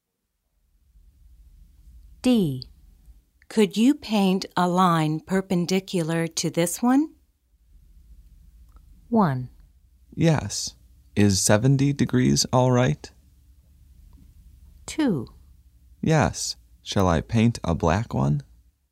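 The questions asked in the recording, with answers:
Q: Could you paint a line perpendicular to this one?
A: 2: Yes. Shall I paint a black one?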